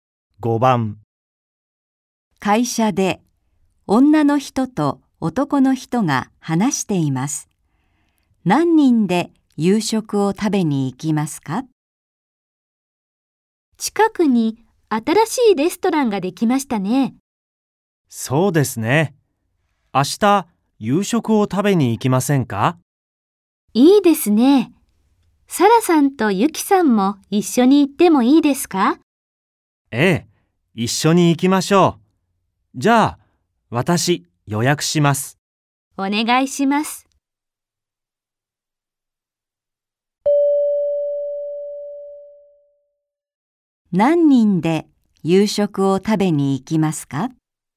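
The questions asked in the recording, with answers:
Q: 何人で夕食を食べに行きますか?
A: 4人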